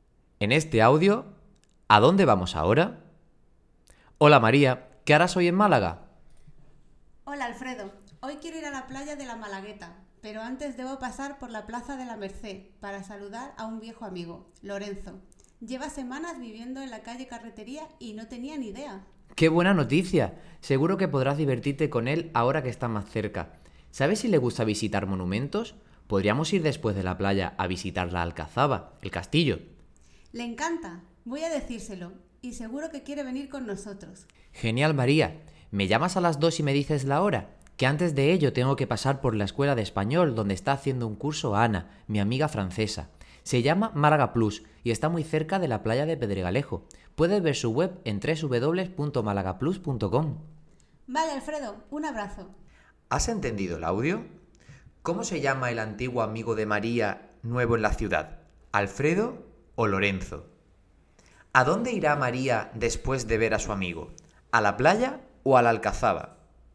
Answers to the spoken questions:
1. El antiguo amigo de María se llama Lorenzo
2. María, después de ver a su amigo, va a ir a la playa.